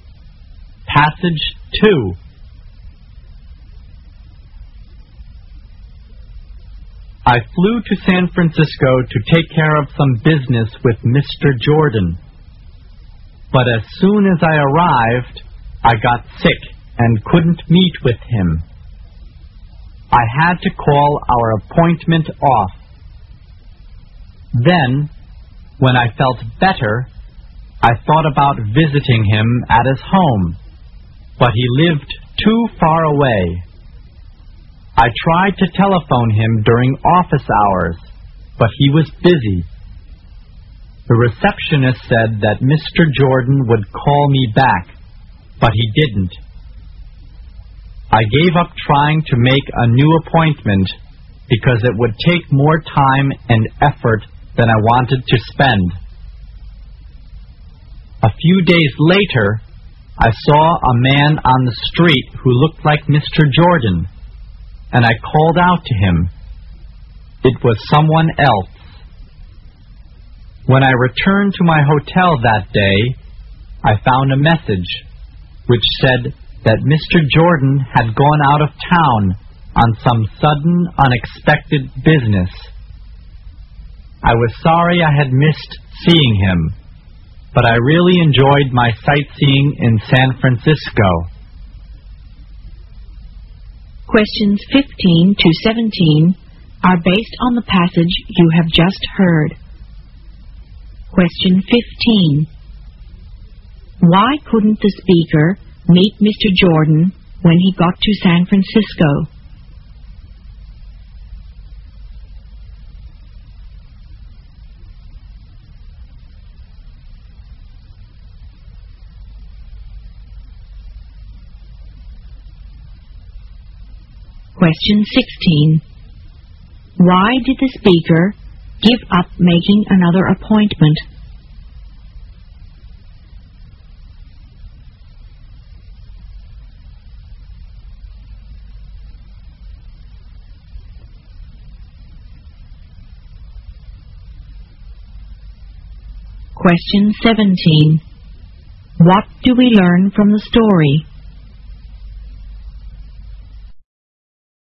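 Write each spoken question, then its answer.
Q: Why couldn't the speaker meet Mr. Jordan when he got to San Francisco?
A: He got sick.

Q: Why did the speaker give up making another appointment?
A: It would take more time and effort than he wanted to spend.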